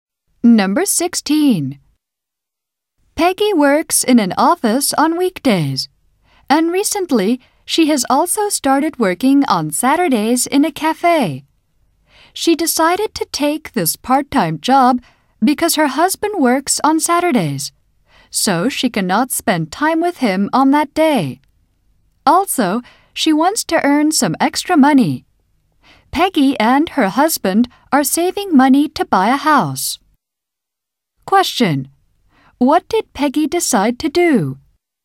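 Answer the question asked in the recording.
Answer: Take a part-time job working at a cafe on Saturdays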